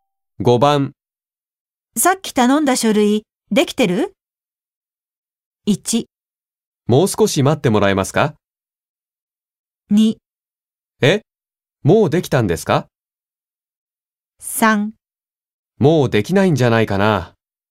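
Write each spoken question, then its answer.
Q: さっき頼んだ書類、できてる?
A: 1: もう少し待ってもらえますか?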